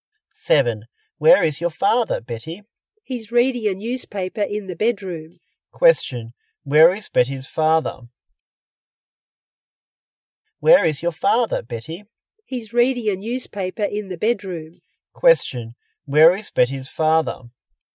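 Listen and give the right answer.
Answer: In the bedroom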